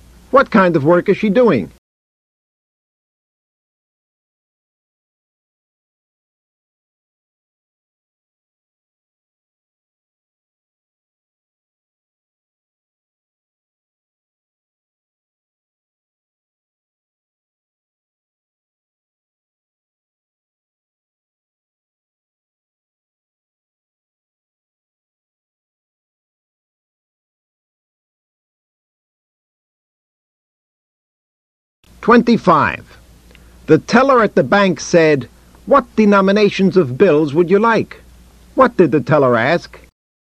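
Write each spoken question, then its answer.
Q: What did the teller ask?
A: Which denominations of bills you would like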